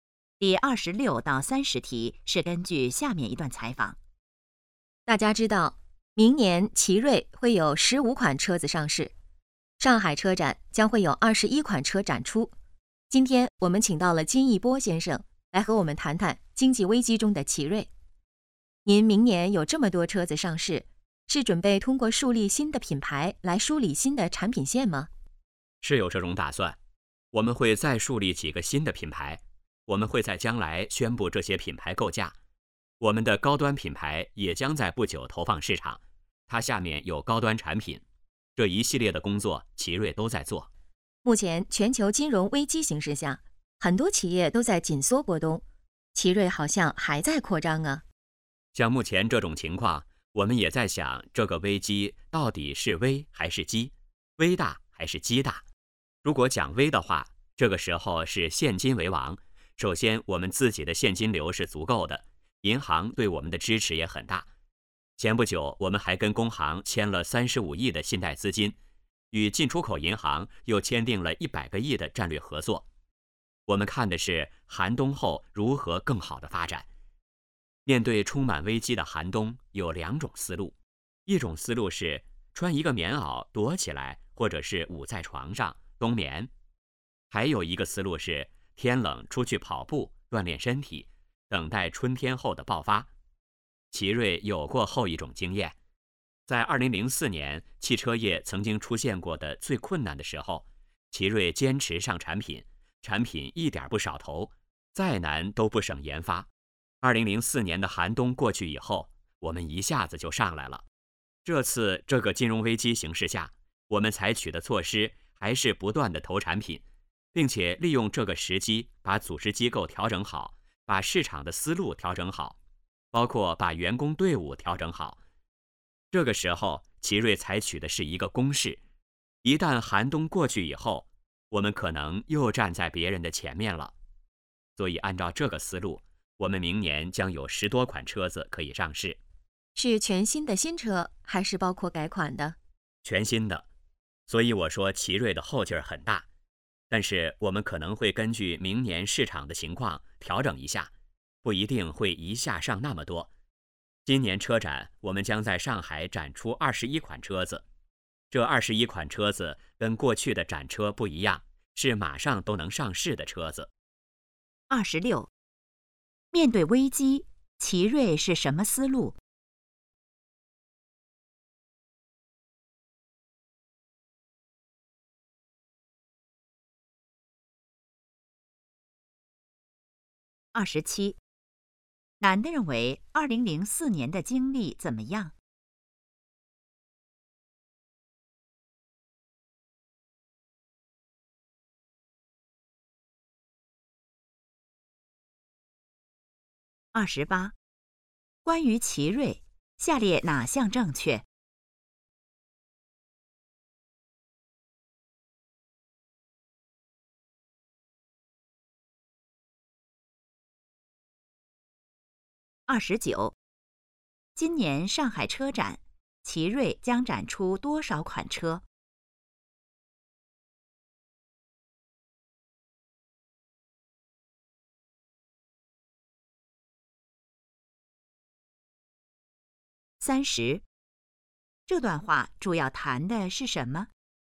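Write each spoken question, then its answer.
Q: 面对危机,奇瑞是什么思路?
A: 采取攻势,不断投产品,像天冷出去跑步锻炼

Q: 今年上海车展,奇瑞将展出多少款车?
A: 21款

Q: 这段话主要谈的是什么?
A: 经济危机中的奇瑞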